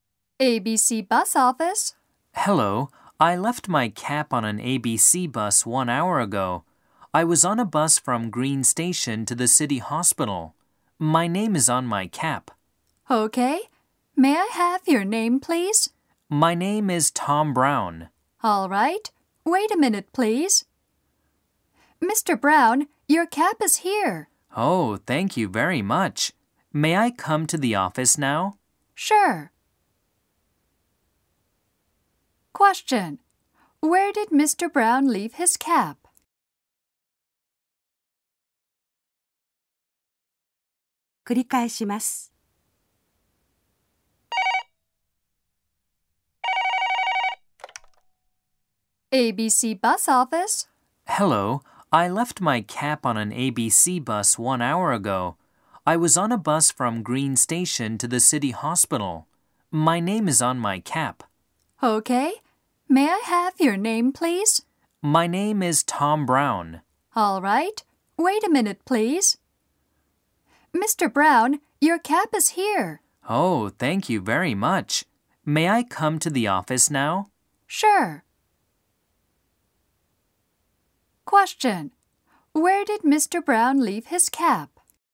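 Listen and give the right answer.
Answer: On an ABC bus (from Green Station to the City Hospital)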